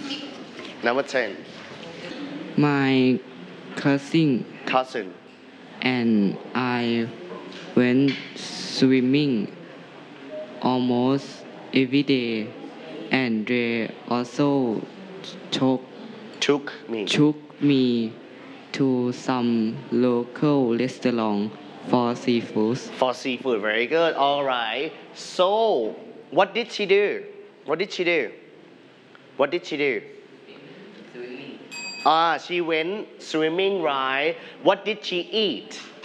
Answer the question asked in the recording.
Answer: Seafood.